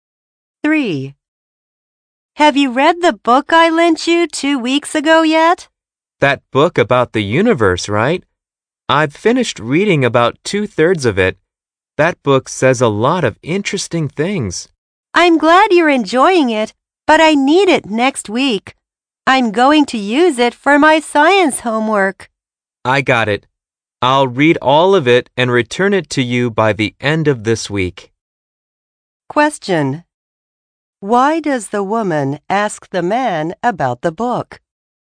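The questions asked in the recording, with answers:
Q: Why does the woman ask the man about the book?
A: Because she needs it back next week for her science homework.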